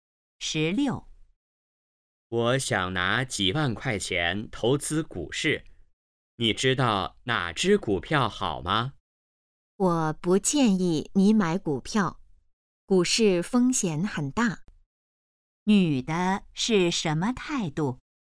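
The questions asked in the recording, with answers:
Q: 女的是什么态度?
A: 不建议买股票(反对)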